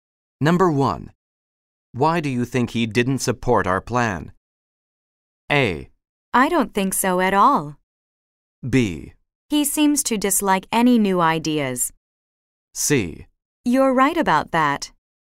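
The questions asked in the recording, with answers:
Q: Why do you think he didn't support our plan?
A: B: He seems to dislike any new ideas.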